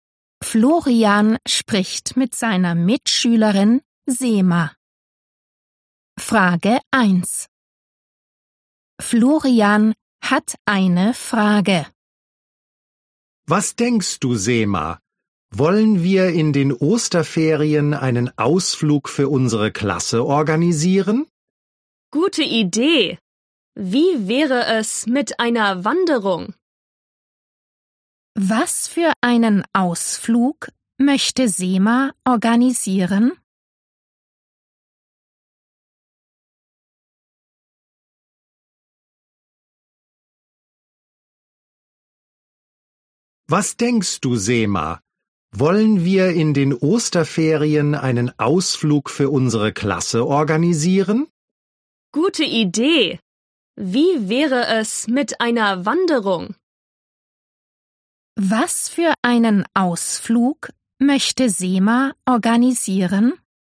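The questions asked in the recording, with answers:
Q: Was für einen Ausflug möchte Sema organisieren?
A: Eine Wanderung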